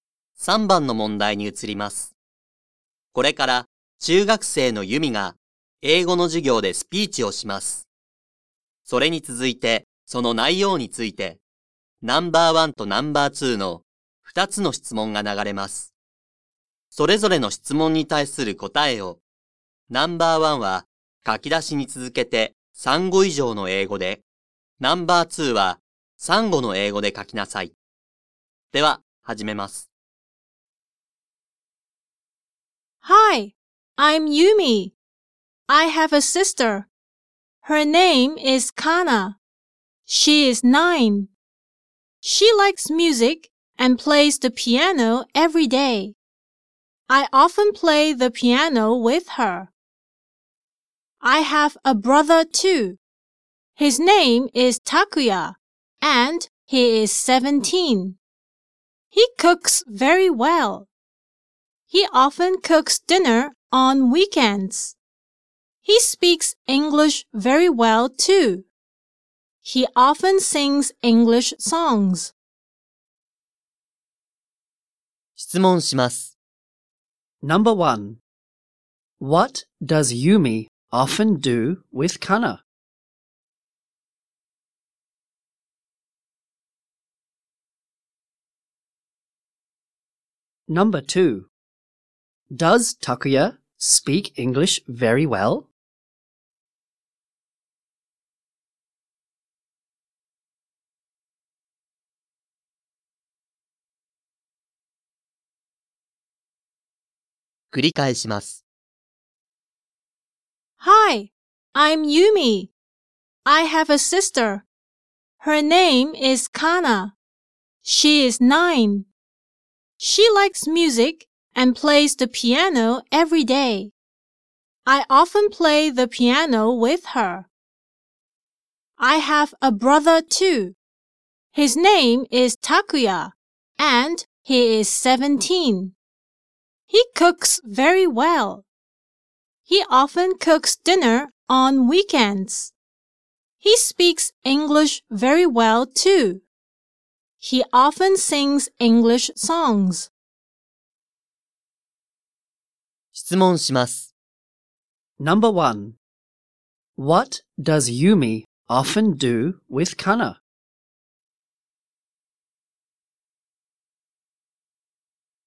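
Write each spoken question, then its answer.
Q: What does Yumi often do with Kana?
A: She often plays the piano with her.

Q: Does Takuya speak English very well?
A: Yes, he does.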